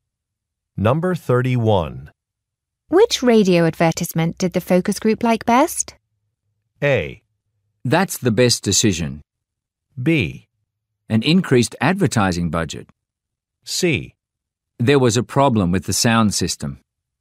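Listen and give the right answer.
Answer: C: There was a problem with the sound system.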